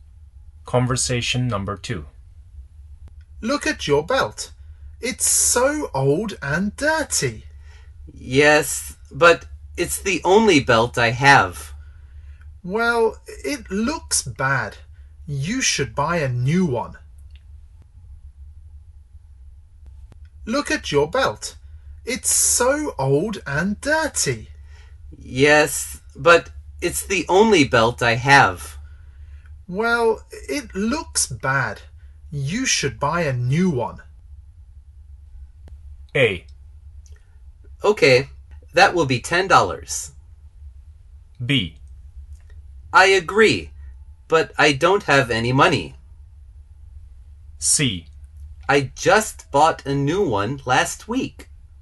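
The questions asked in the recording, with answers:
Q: Well, it looks bad. You should buy a new one.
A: B: I agree, but I don't have any money.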